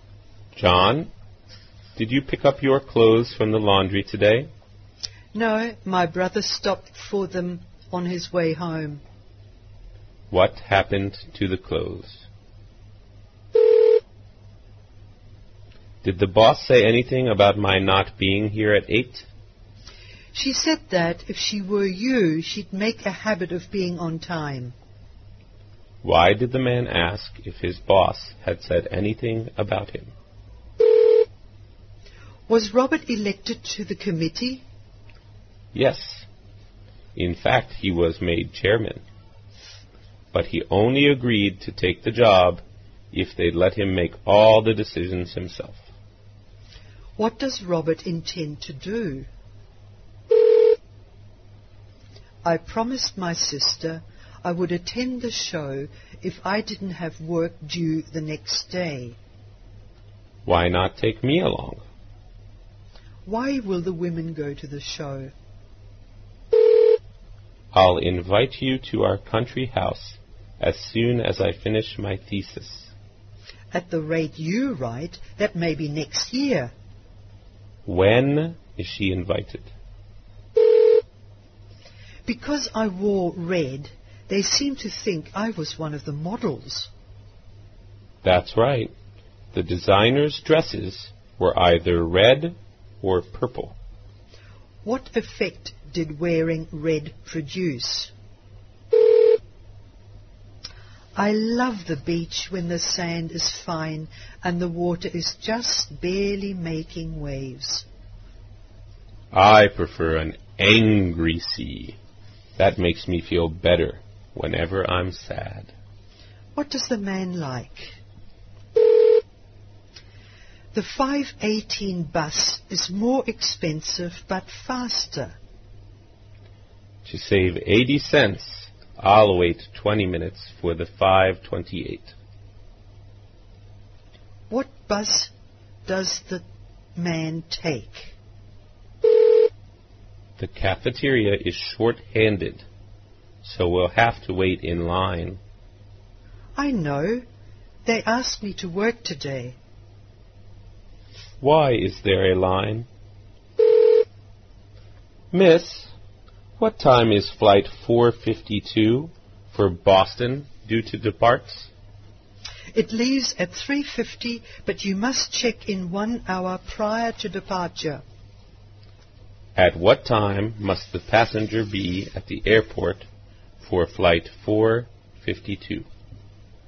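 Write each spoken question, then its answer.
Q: What happened to the clothes?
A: The man's brother picked them up from the laundry on his way home.

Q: Why did the man ask if his boss had said anything about him?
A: He was not there at 8; he was late.

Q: What does Robert intend to do?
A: Make all the committee's decisions himself as chairman.

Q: When is she invited?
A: When he finishes his thesis, which may not be until next year.

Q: What effect did wearing red produce?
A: People thought she was one of the models.

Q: What does the man like?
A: An angry, rough sea.

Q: What bus does the man take?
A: The 5:28 bus.

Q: Why is there a line?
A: The cafeteria is short-handed.

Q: At what time must the passenger be at the airport for flight 452?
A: By 2:50.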